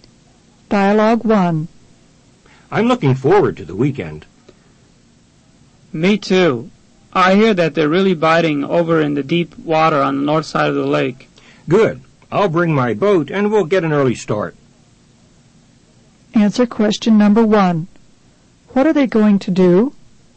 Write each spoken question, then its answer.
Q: What are they going to do?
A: Number 1 is B.